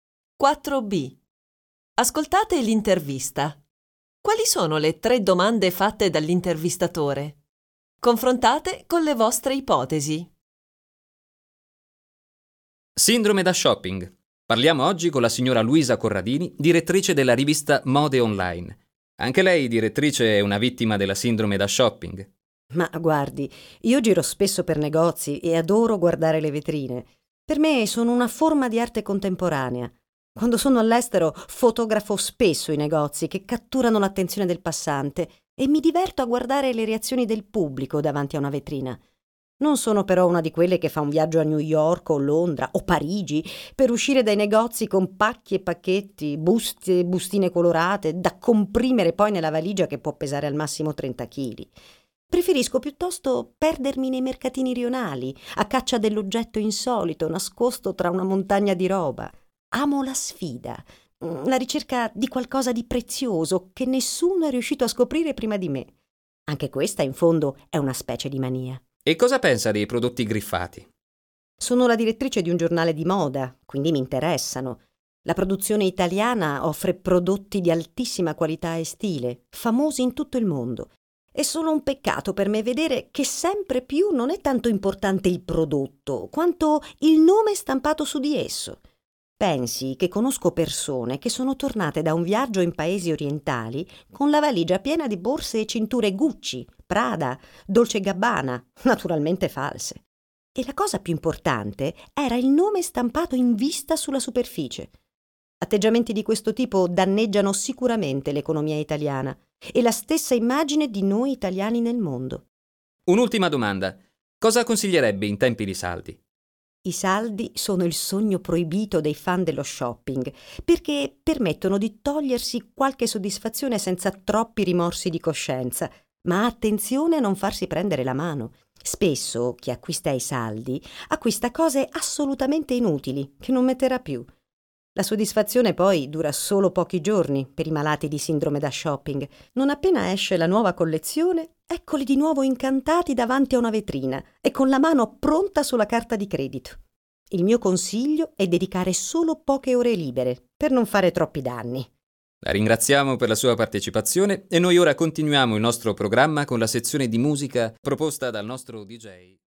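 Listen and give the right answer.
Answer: Anche lei è una vittima della sindrome da shopping? Cosa pensa dei prodotti griffati? Cosa consiglierebbe in tempi di saldi?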